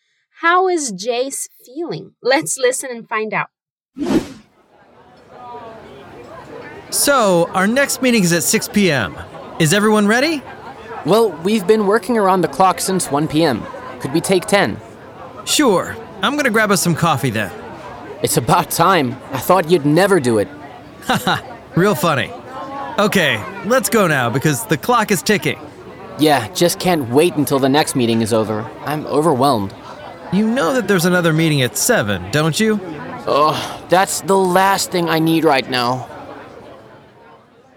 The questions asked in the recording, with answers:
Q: How is Jace feeling?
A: Well, Jace is tired and in need of some rest.